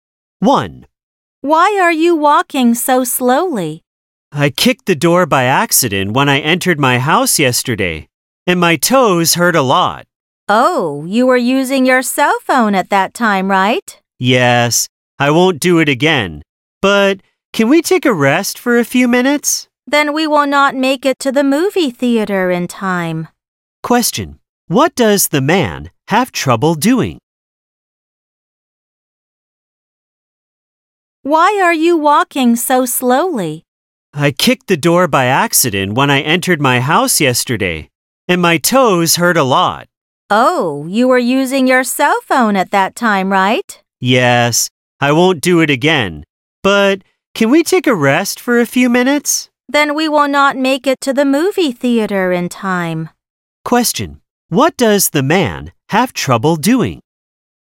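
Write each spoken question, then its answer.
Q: What does the man have trouble doing?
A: Walking (his toes hurt)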